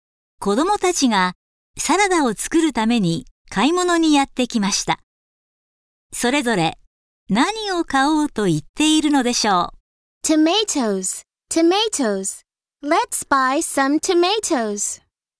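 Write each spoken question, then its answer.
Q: それぞれ何を買おうと言っているのでしょう。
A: トマト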